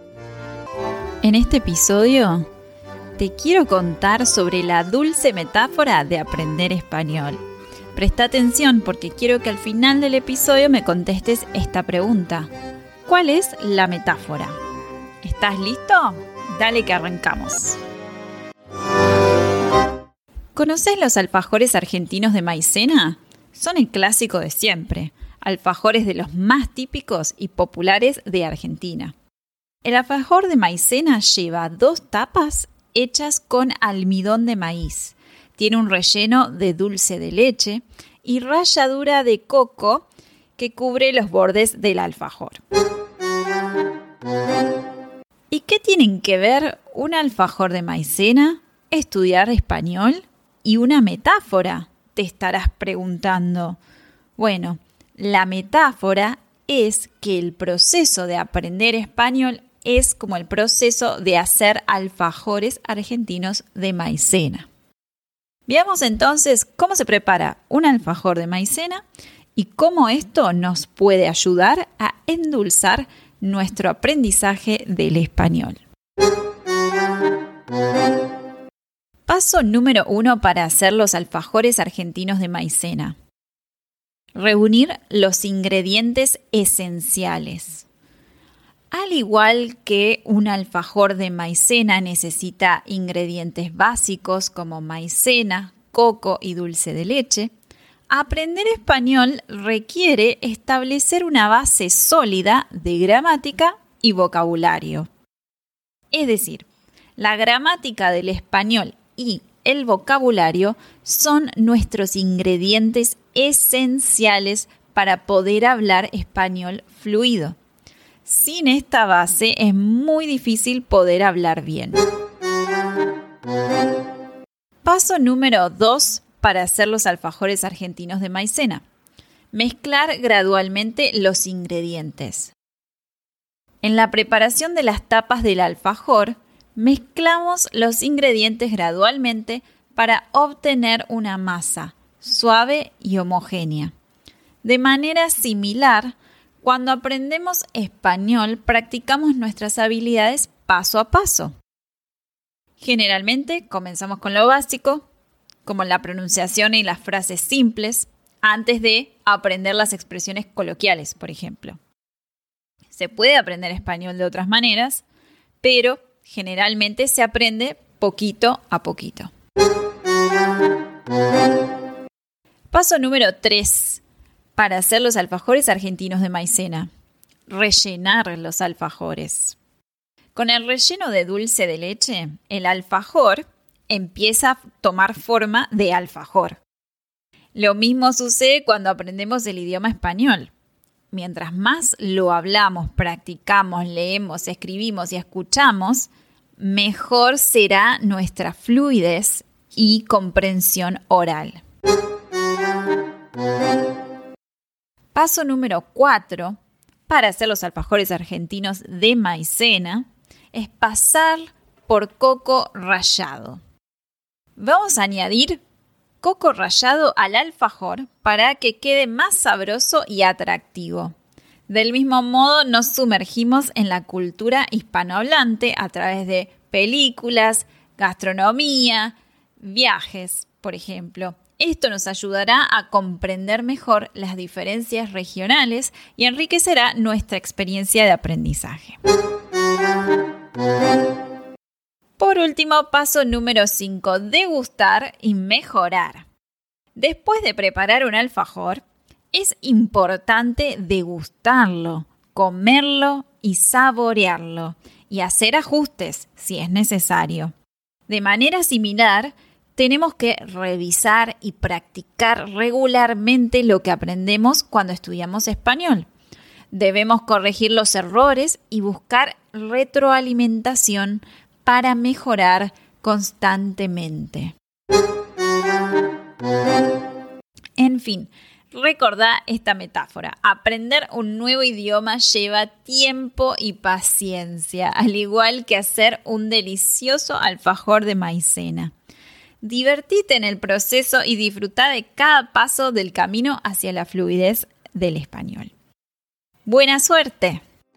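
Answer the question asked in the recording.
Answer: Aprender español es como hacer alfajores argentinos de maicena.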